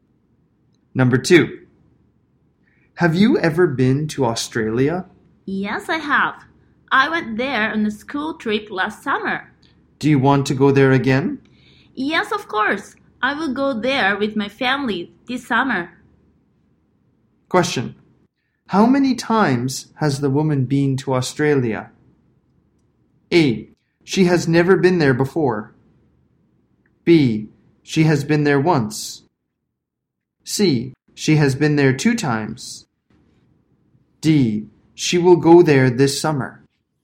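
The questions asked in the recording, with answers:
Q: How many times has the woman been to Australia?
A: B: She has been there once.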